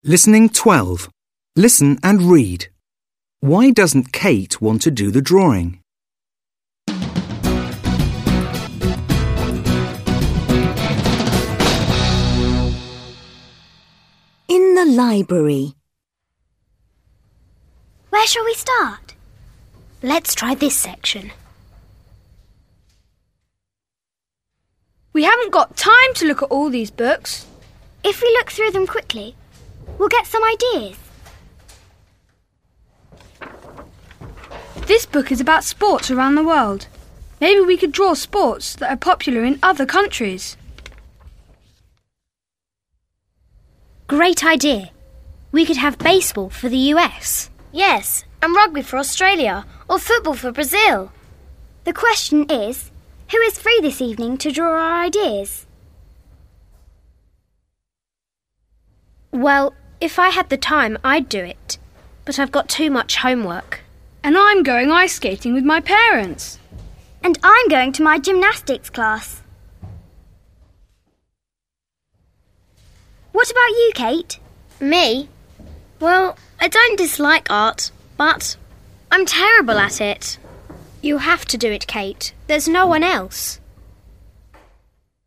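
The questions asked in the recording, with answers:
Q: Why doesn't Kate want to do the drawing?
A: Because she is terrible at art.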